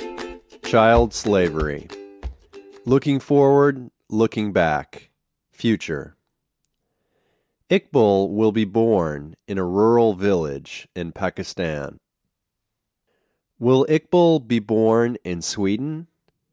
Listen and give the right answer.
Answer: No, Iqbal won't be born in Sweden.